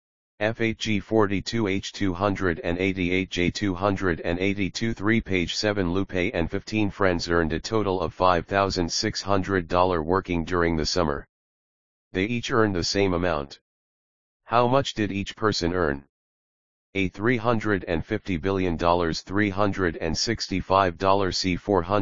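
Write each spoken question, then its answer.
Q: How much did each person earn?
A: A: $350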